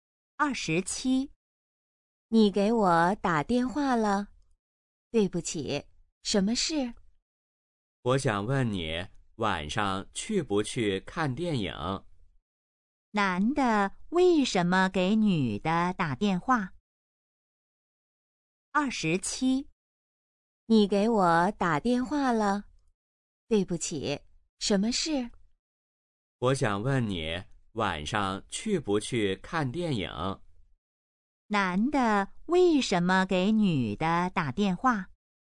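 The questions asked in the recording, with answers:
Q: 男的为什么给女的打电话?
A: 想问她晚上去不去看电影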